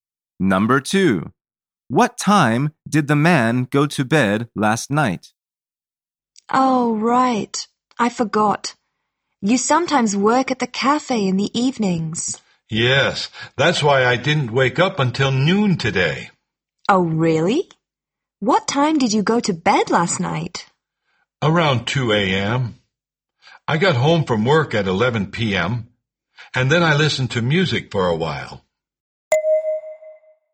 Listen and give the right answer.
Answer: The answer is around 2 a.m.